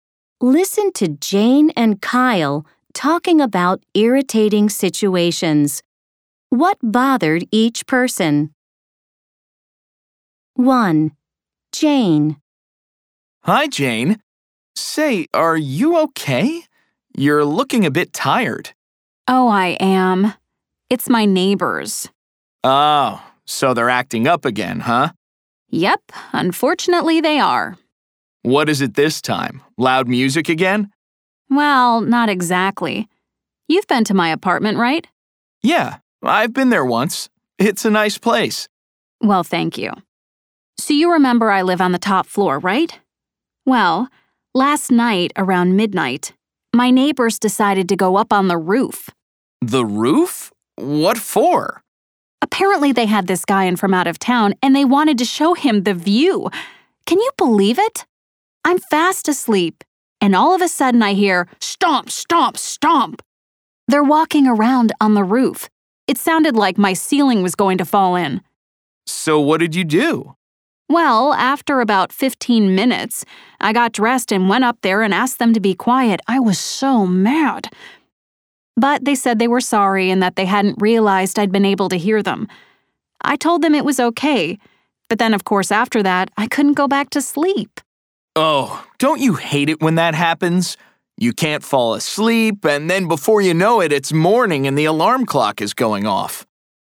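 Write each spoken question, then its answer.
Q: What bothered each person? 1. Jane.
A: Her neighbors walked around on the roof at midnight and woke her up.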